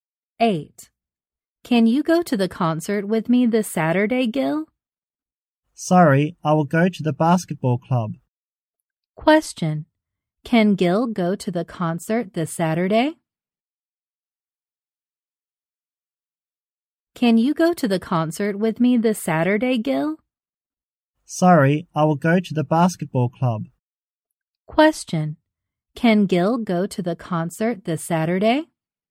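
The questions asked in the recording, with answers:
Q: Question. Can Gil go to the concert this Saturday?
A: No, he will go to the basketball club.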